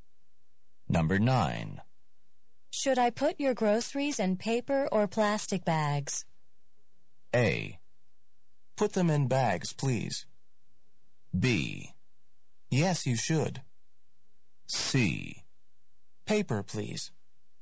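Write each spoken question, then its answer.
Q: Should I put your groceries in paper or plastic bags?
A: C: Paper, please.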